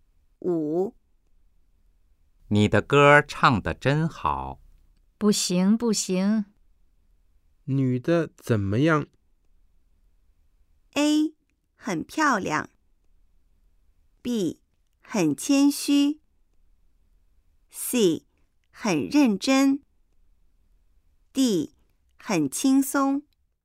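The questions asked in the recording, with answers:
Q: 女的怎么样?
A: B: 很谦虚。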